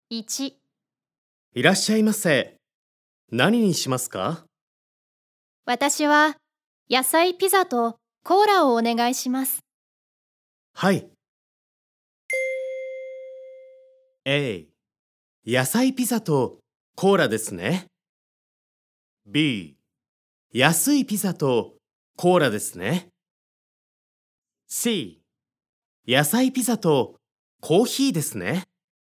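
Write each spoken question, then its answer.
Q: いらっしゃいませ。何にしますか?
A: A: 野菜ピザとコーラですね。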